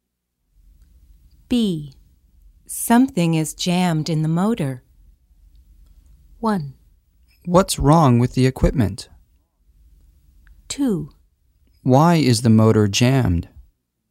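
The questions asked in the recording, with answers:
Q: Something is jammed in the motor.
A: 1: What's wrong with the equipment?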